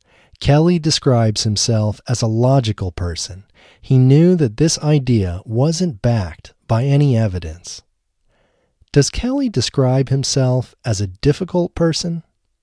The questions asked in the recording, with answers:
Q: Does Kelly describe himself as a difficult person?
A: No, Kelly doesn't describe himself as a difficult person.